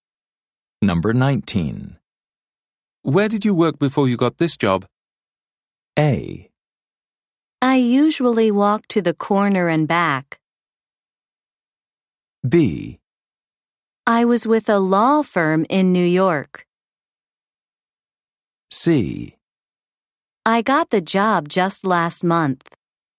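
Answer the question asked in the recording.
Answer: B: I was with a law firm in New York.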